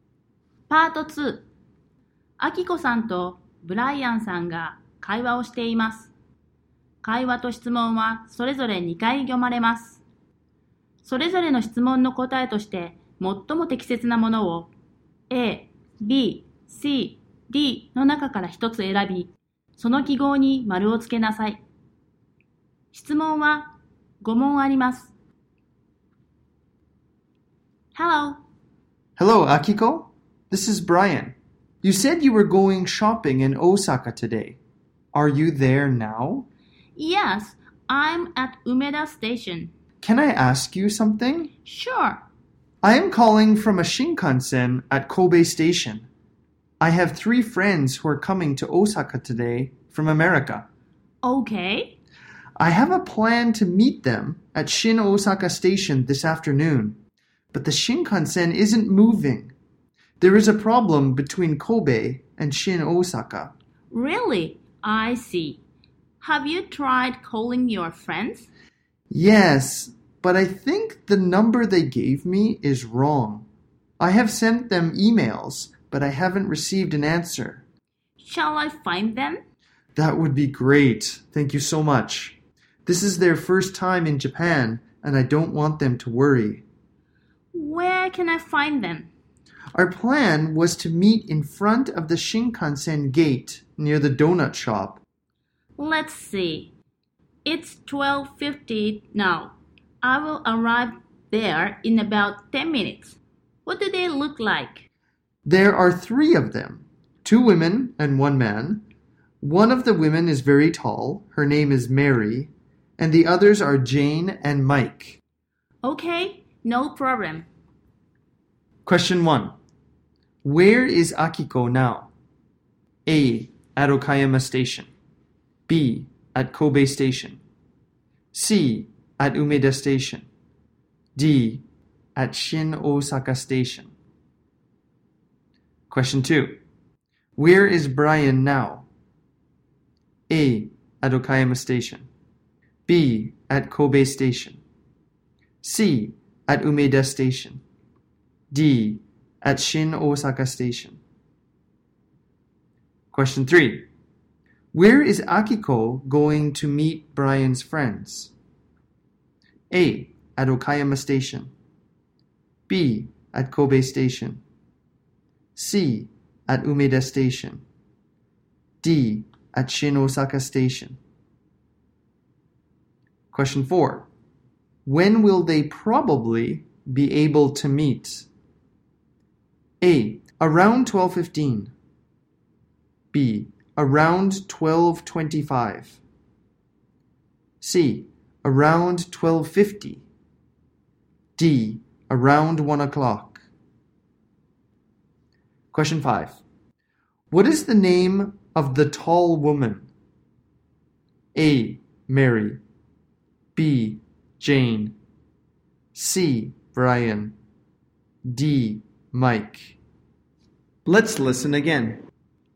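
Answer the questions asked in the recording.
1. C: At Umeda Station.
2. B: At Kobe Station.
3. D: At Shin Osaka Station.
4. D: Around 1 o'clock.
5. A: Mary.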